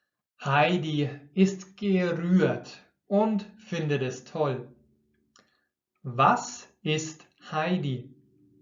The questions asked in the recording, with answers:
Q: Was ist Heidi?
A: Gerührt. Sie ist gerührt, also ganz emotional voller Gefühle.